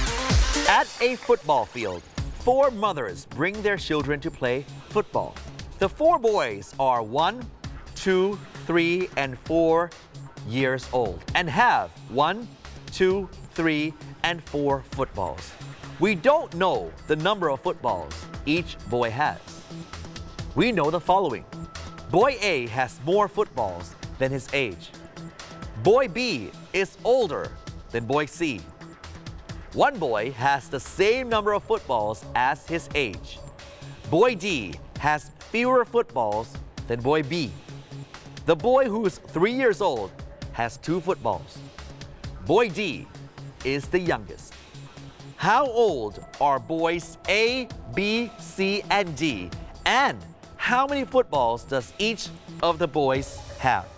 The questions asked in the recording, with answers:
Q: How old are boys A, B, C, and D? And how many footballs does each of the boys have?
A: A is a 2 years old boy and has 4 footballs. B is 4 years old and has 3 footballs. C is 3 years old and has 2 footballs. And D is 1 year old and has 1 football.